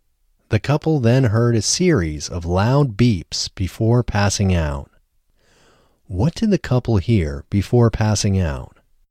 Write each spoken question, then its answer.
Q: What did the couple hear before passing out?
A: The couple heard a series of loud beeps before passing out.